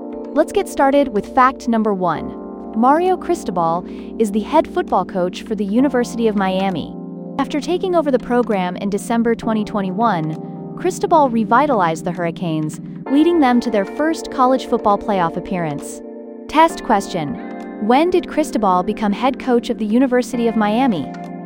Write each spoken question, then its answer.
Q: when did Cristobal become head coach of the University of Miami?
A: December 2021.